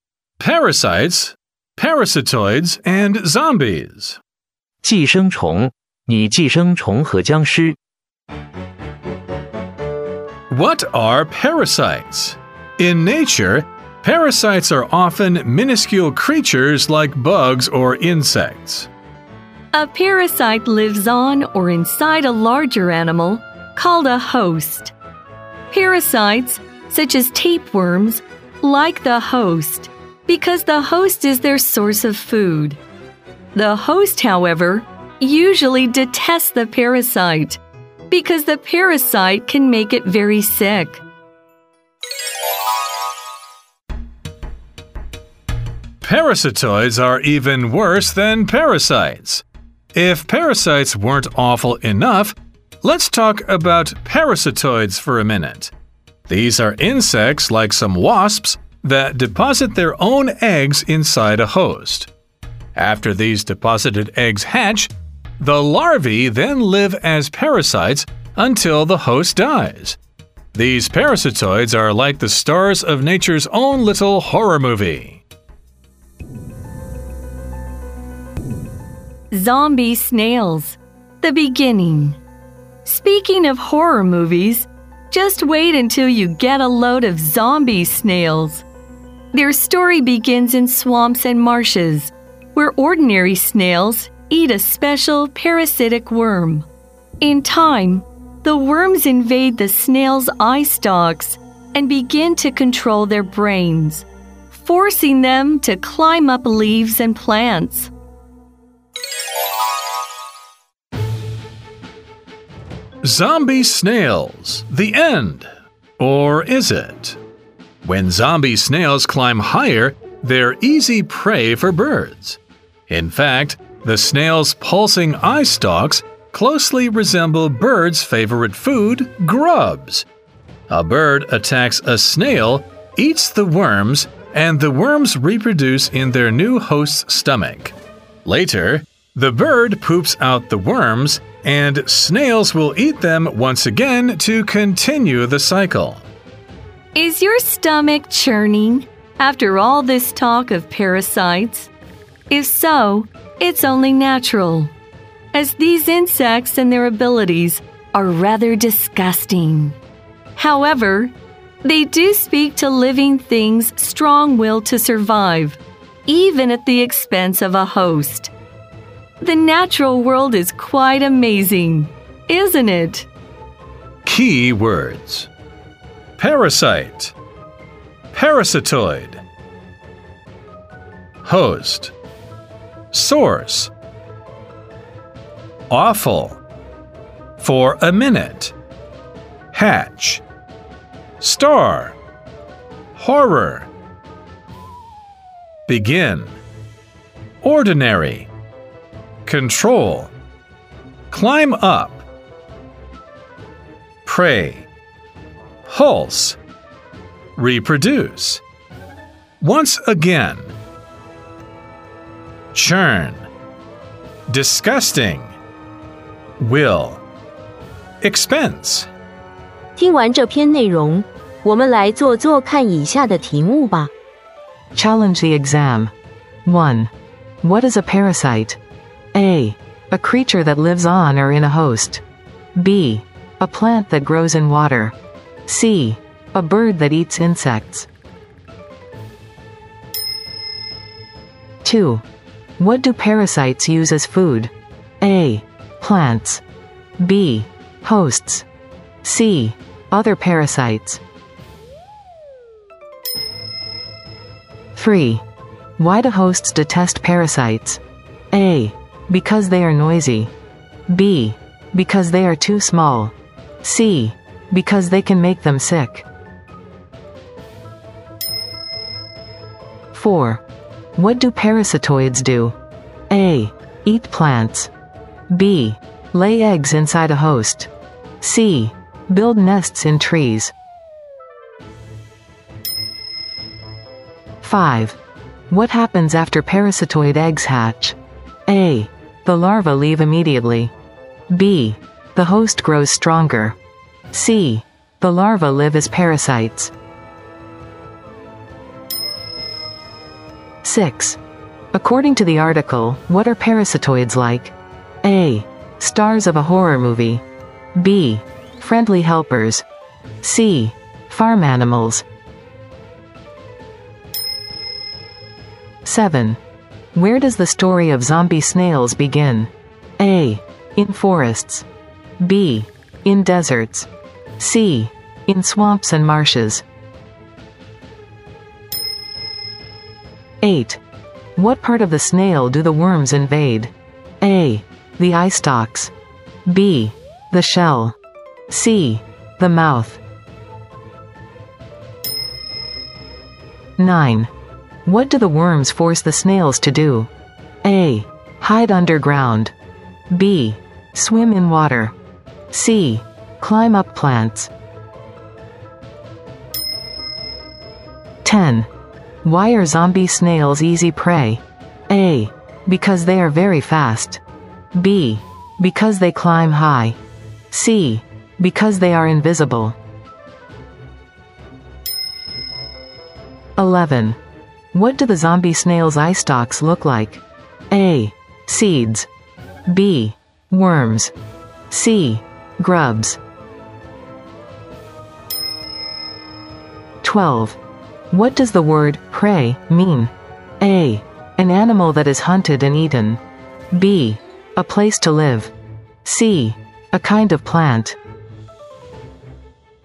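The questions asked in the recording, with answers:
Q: What is a parasite?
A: A: A creature that lives on or in a host.

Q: What do parasites use as food?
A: B: Hosts.

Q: Why do hosts detest parasites?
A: C: Because they can make them sick.

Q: What do parasitoids do?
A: B: Lay eggs inside a host.

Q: What happens after parasitoid eggs hatch?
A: C: The larvae live as parasites.

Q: According to the article, what are parasitoids like?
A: A: Stars of a horror movie.

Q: Where does the story of zombie snails begin?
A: C: In swamps and marshes.

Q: What part of the snail do the worms invade?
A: A: The eye stalks.

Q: What do the worms force the snails to do?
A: C: Climb up plants.

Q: Why are zombie snails easy prey?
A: B: Because they climb high.

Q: What do the zombie snail's eye stalks look like?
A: C: Grubs.

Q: What does the word prey mean?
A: A: An animal that is hunted and eaten.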